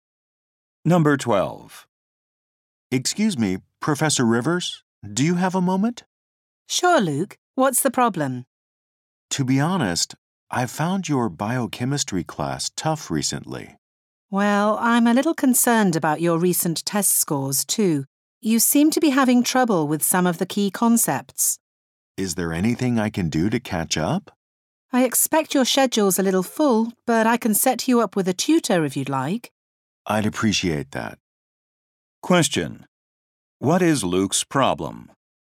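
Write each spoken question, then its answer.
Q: What is Luke's problem?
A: He is struggling with his biochemistry class and key concepts.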